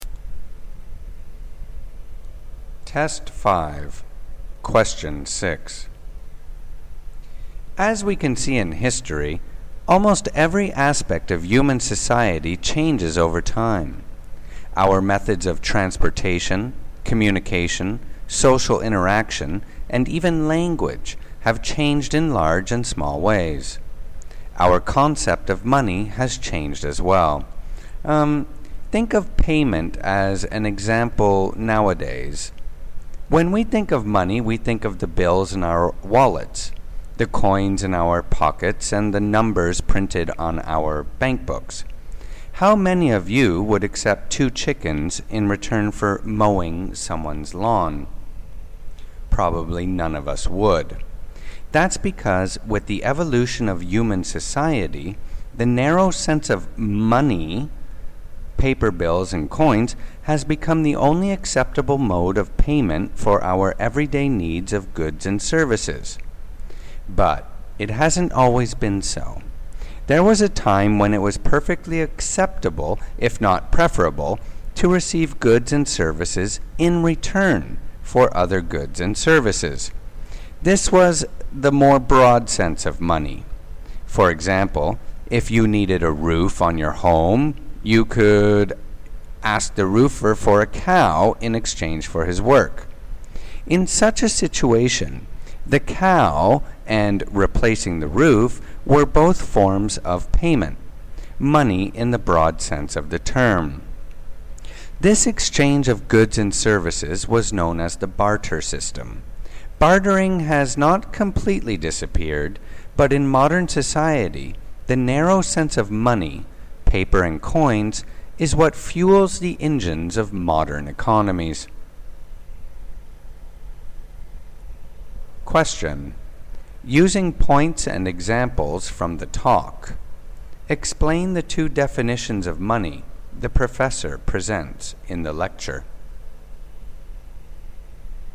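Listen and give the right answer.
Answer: Narrow sense: paper bills and coins, now the only accepted payment for everyday goods and services. Broad sense: goods and services traded for other goods and services (barter), e.g. a cow for a new roof.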